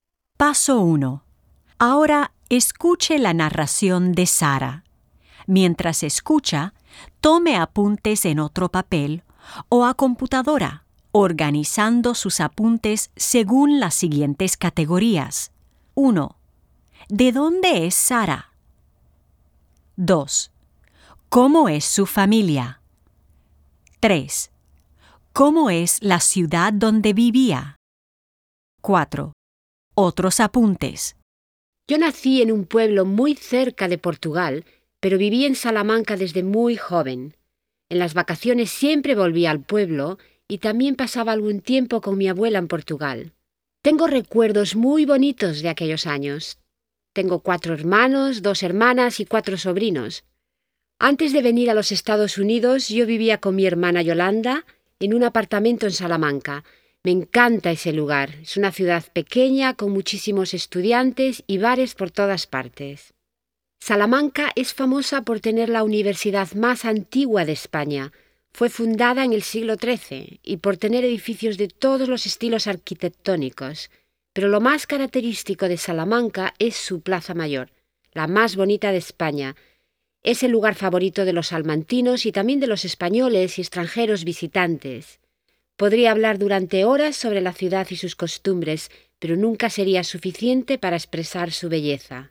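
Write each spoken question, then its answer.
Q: ¿De dónde es Sara?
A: De un pueblo muy cerca de Portugal; vivió en Salamanca desde muy joven

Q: ¿Cómo es su familia?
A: Tiene 4 hermanos, 2 hermanas y 4 sobrinos; vivía con su hermana Yolanda

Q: ¿Cómo es la ciudad donde vivía?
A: Salamanca: pequeña, con muchísimos estudiantes y bares, la universidad más antigua de España y una Plaza Mayor muy bonita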